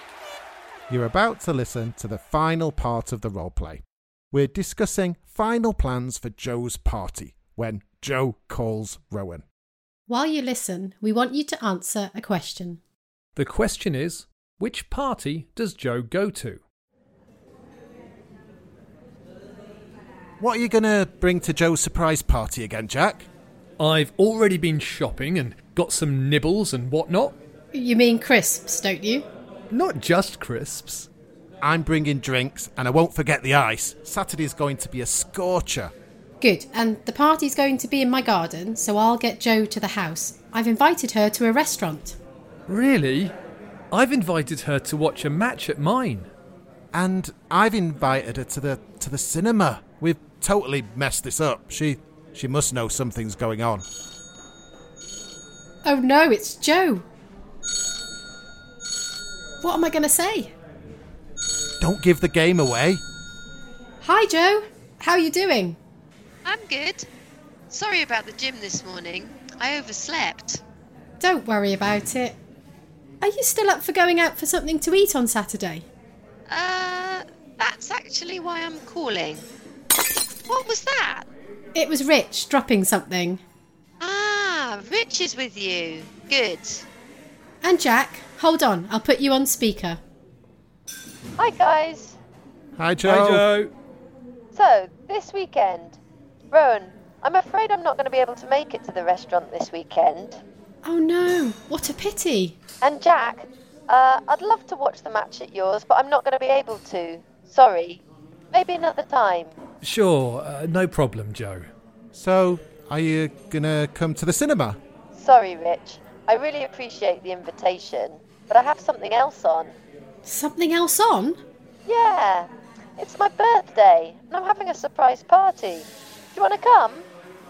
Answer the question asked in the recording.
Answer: Well, in the end, Jo organised her own party and we were all invited.